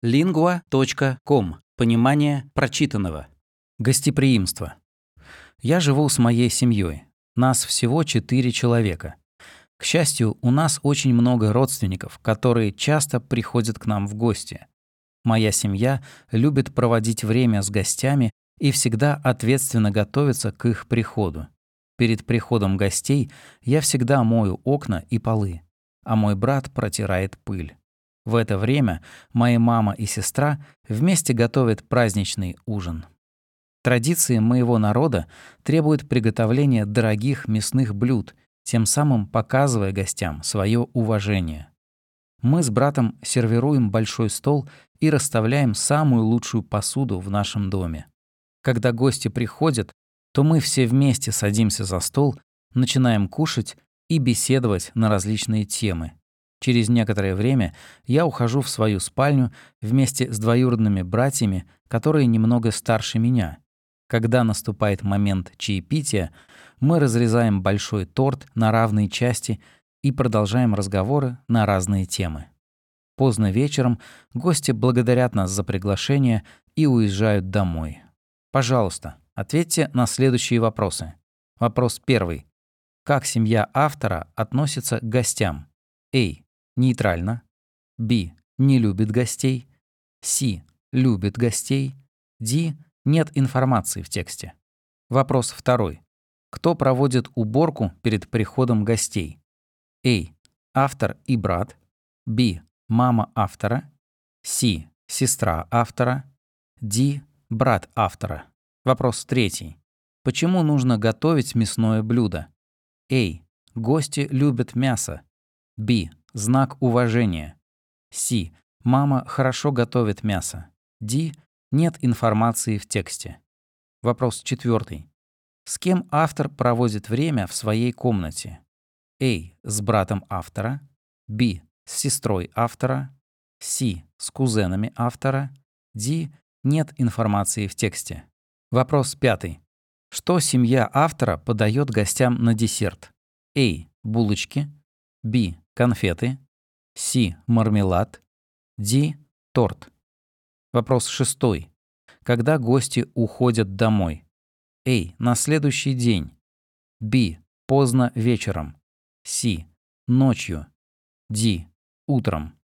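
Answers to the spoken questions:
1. C: Любит гостей.
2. A: Автор и брат.
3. B: Знак уважения.
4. C: С кузенами автора.
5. D: Торт.
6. B: Поздно вечером.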